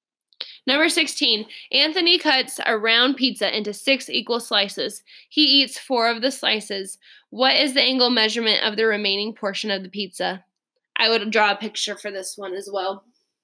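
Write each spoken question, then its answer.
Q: What is the angle measurement of the remaining portion of the pizza?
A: 120 degrees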